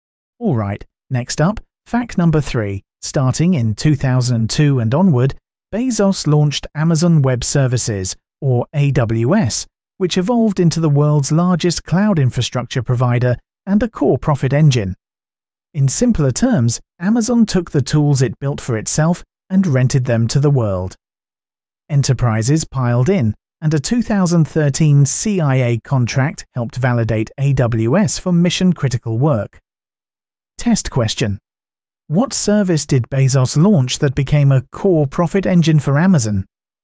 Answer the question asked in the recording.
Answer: Correct answer, AWS.